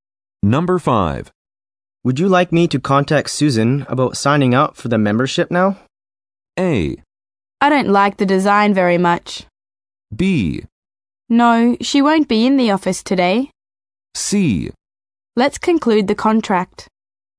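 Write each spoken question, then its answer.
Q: Would you like me to contact Susan about signing up for the membership now?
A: B: No, she won't be in the office today.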